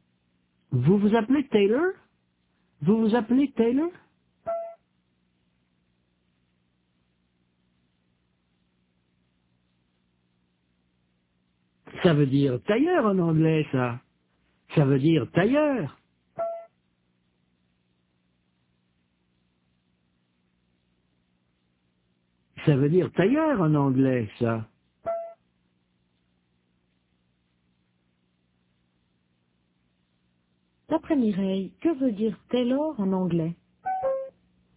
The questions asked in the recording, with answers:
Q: D'après Mireille, que veut dire Taylor en anglais?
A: Tailleur, ça veut dire tailleur.